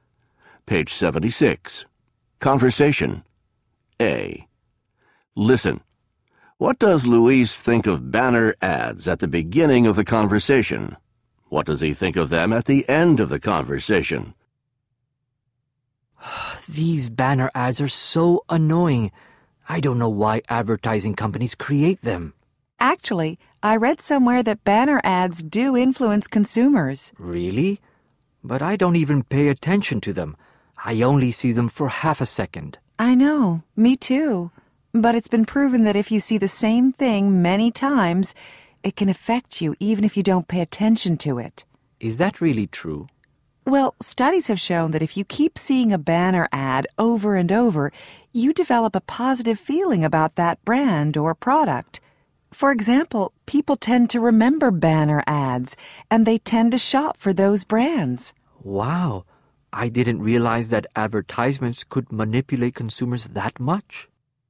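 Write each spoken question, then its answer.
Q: What does Luis think of banner ads at the beginning of the conversation?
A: He thinks they are annoying and doesn't pay attention to them.

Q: What does he think of them at the end of the conversation?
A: He realizes they can influence or manipulate consumers.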